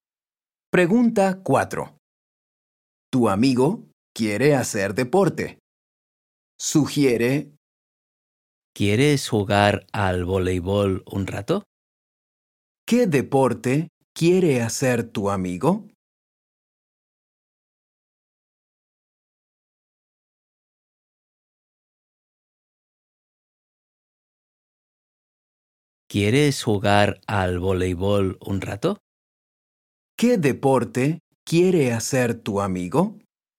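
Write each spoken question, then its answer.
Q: ¿Qué deporte quiere hacer tu amigo?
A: Voleibol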